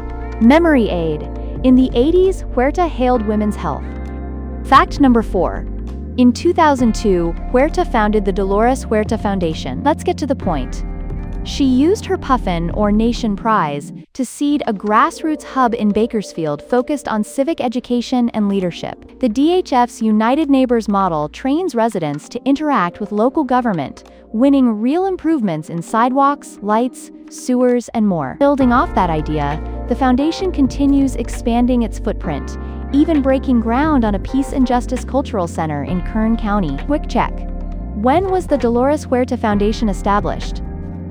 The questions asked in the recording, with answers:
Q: When was the Dolores Huerta Foundation established?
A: Correct answer, 2002.